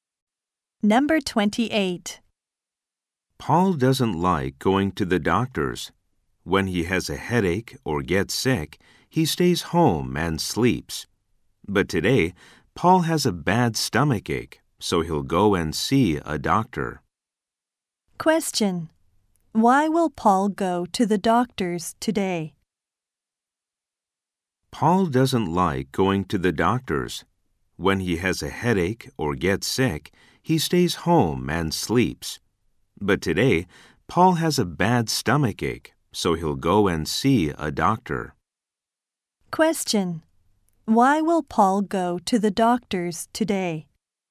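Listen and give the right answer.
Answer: He has a bad stomach ache.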